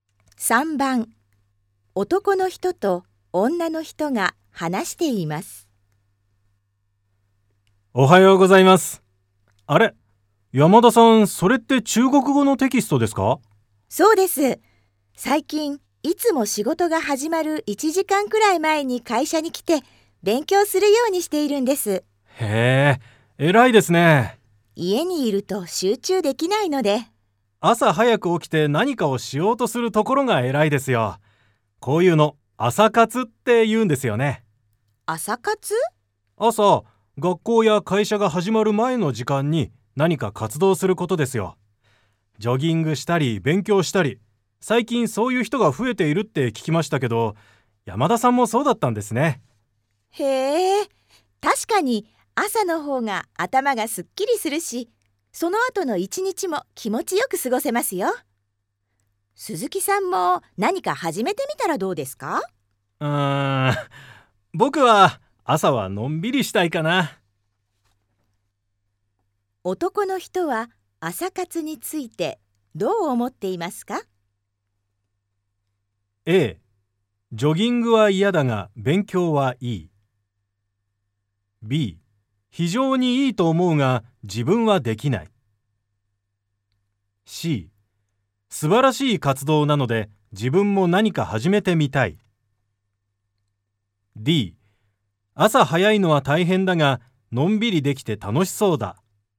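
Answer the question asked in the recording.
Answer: B: 非常にいいと思うが自分はできない。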